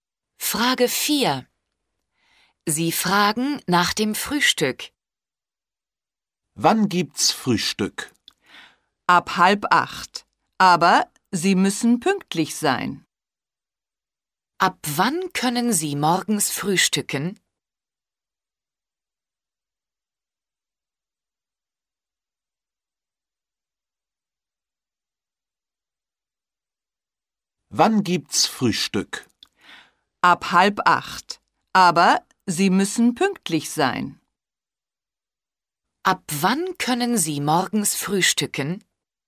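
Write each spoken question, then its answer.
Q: Ab wann können Sie morgens frühstücken?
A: ab 7:30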